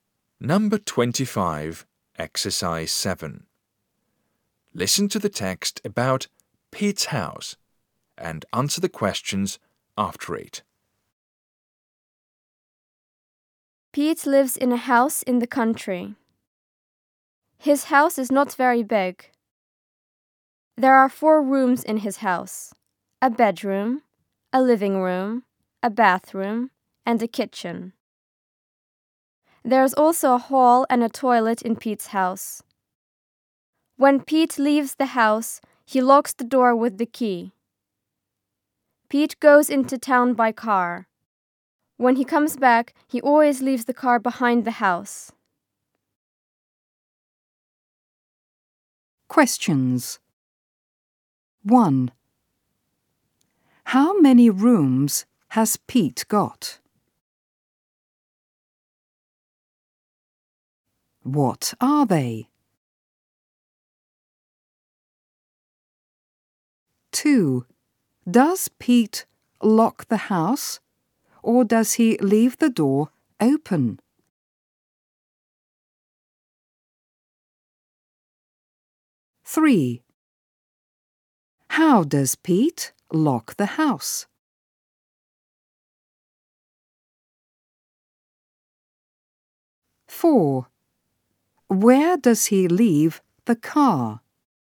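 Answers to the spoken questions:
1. Four
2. A bedroom, a living room, a bathroom and a kitchen
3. He locks the house
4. With the key
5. Behind the house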